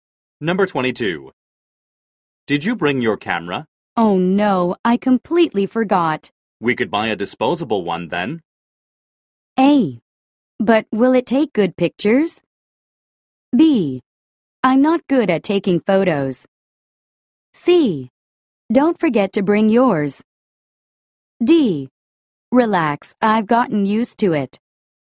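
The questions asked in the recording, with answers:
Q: We could buy a disposable one then.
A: A: But will it take good pictures?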